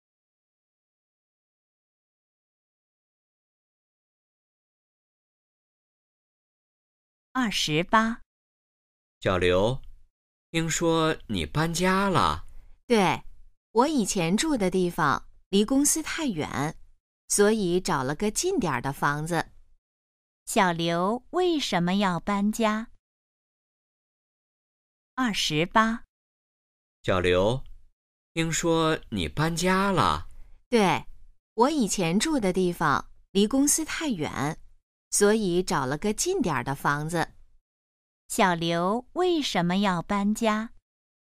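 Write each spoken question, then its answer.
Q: 小刘为什么要搬家?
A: 以前住的地方离公司太远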